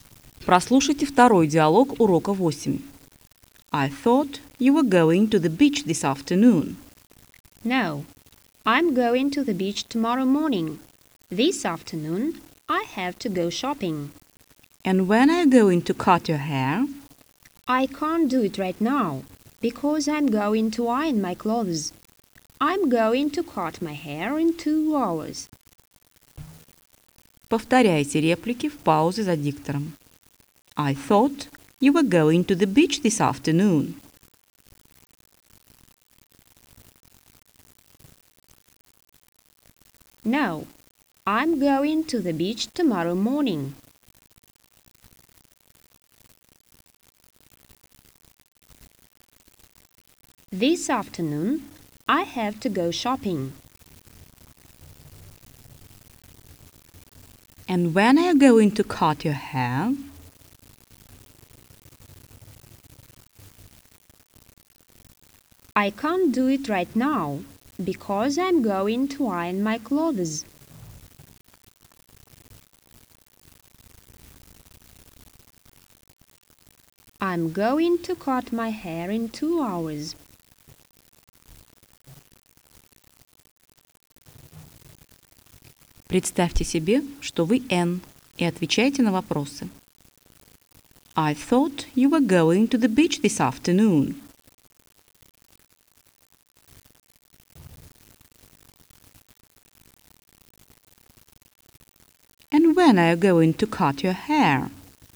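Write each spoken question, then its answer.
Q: And when are you going to cut your hair?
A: In 2 hours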